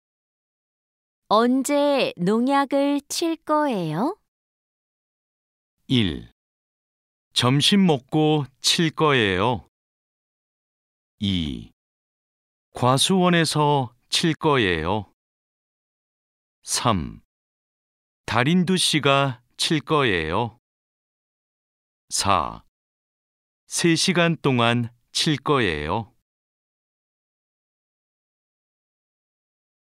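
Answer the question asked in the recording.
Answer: 1: 점심 먹고 칠 거예요.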